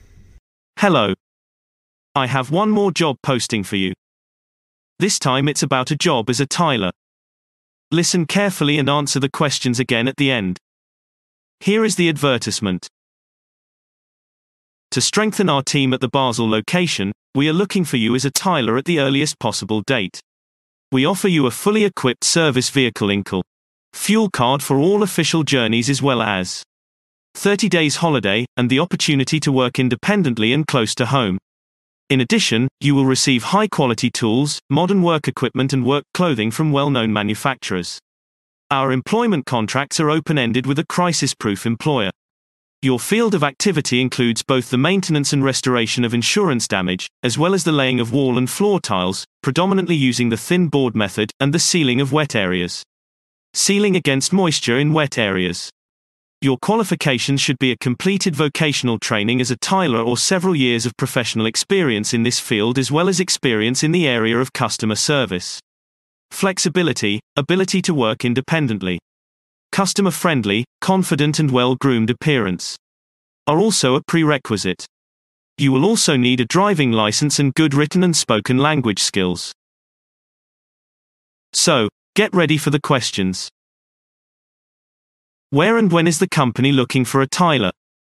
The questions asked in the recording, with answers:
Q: Where and when is the company looking for a tiler?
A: The company is looking for a tiler at the Basel location with immediate effect.